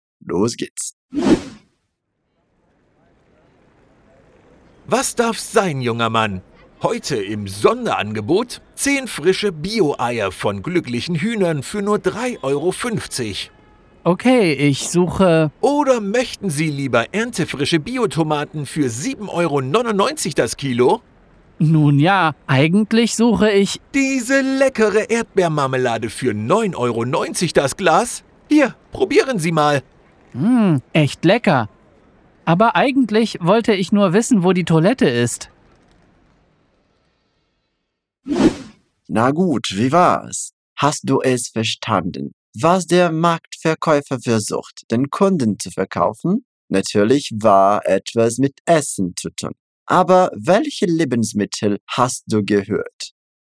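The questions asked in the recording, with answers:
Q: Hast du es verstanden, was der Marktverkäufer versucht, den Kunden zu verkaufen?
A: Bio-Eier, Biotomaten und Erdbeermarmelade

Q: Aber welche Lebensmittel hast du gehört?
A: Eier, Tomaten, Erdbeermarmelade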